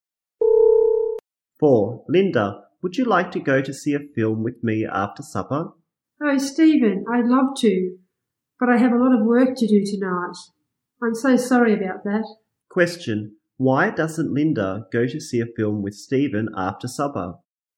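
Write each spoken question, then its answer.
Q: Why doesn't Linda go to see a film with Stephen after supper?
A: She has a lot of work to do tonight.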